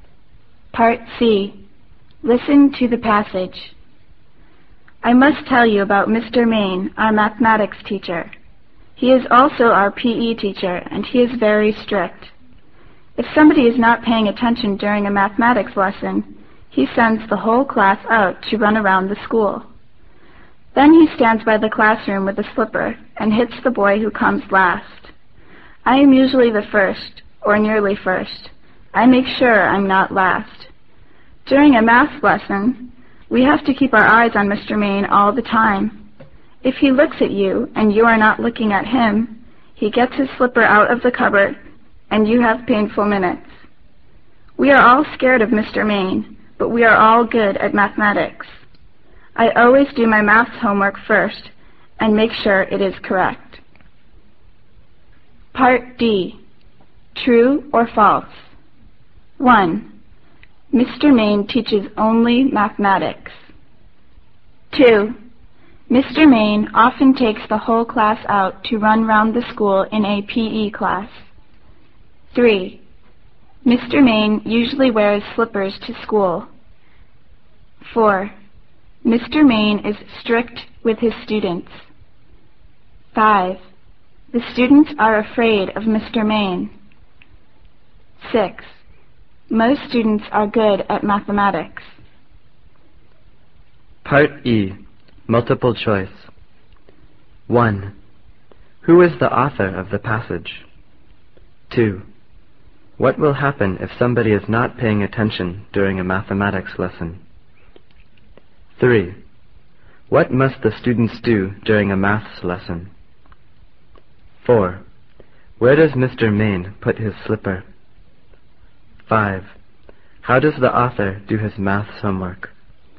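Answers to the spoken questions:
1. False
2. False
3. False
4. True
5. True
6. True
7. A student in Mr. Main's class
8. The whole class is sent out to run around the school
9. Keep their eyes on Mr. Main all the time
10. In the cupboard
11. He does it first and makes sure it is correct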